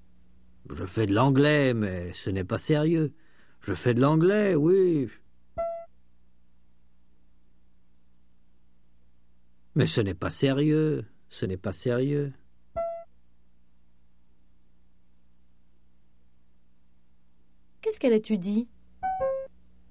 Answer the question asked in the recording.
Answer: L'anglais, mais ce n'est pas sérieux.